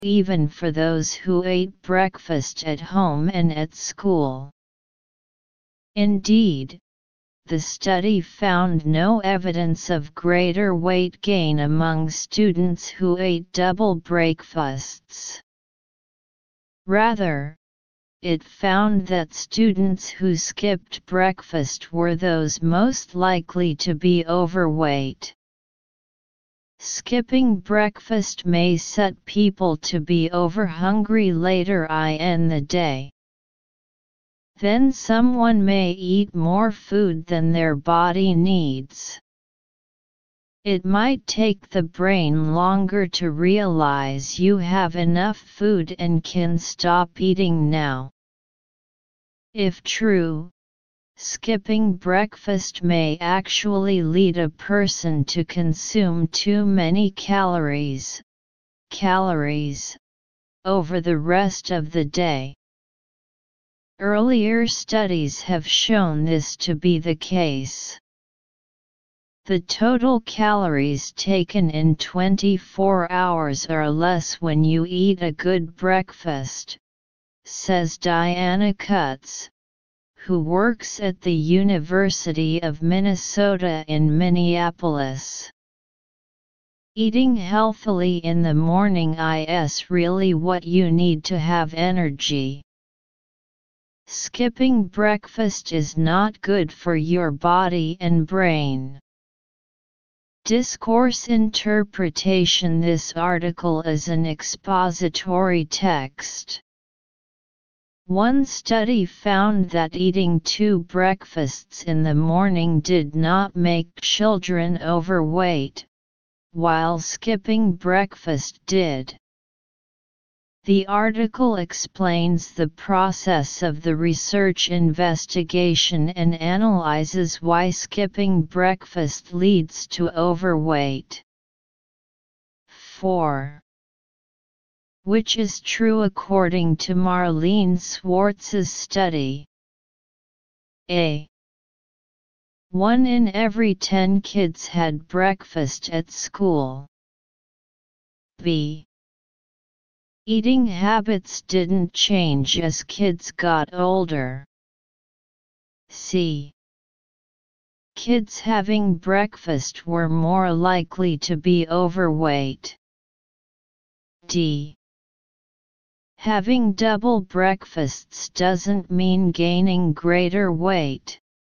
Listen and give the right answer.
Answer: Therefore, choose D.